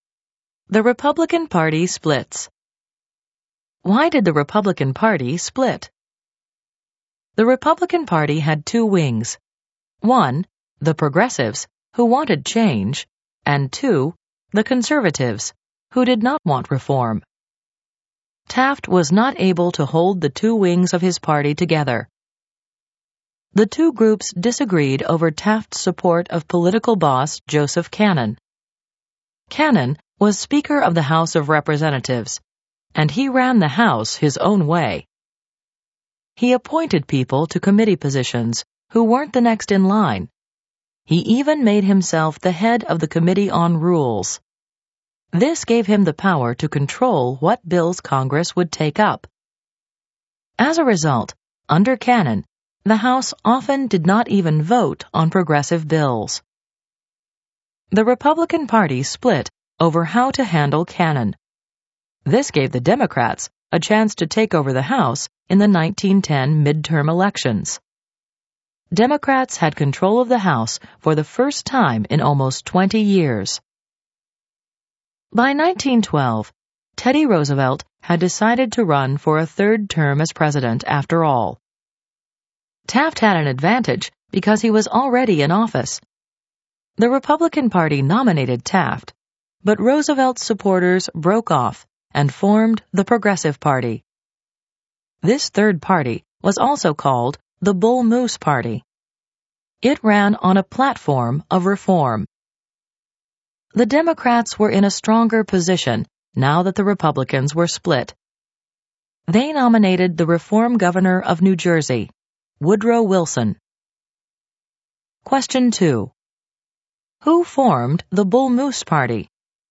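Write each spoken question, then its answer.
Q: Who formed the Bull Moose Party?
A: Roosevelt's supporters (the Progressive Party)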